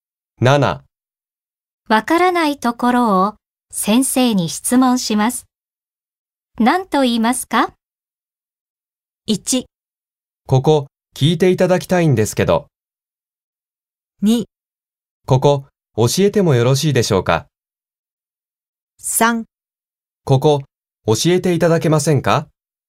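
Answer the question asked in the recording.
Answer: 3: ここ教えていただけませんか?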